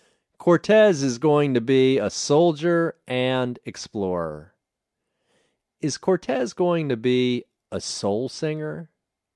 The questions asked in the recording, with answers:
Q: Is Cortez going to be a soul singer?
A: No, he isn't going to be a soul singer.